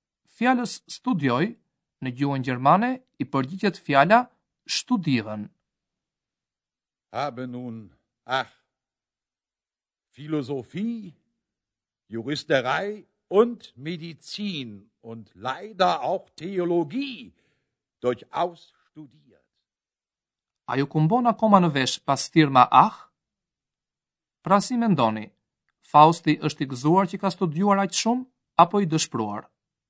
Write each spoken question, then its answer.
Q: Pra si mendoni, Fausti është i gëzuar që ka studuar aqë shumë, apo i dëshpruar?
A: A i është i dëshpruar